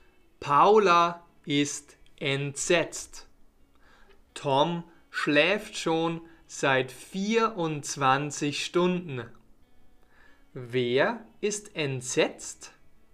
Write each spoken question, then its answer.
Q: Wer ist entsetzt?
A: Paula. Paula ist entsetzt.